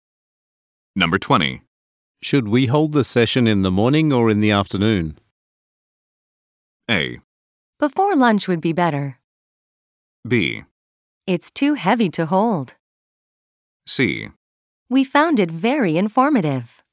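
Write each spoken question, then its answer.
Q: Should we hold the session in the morning or in the afternoon?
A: A: Before lunch would be better.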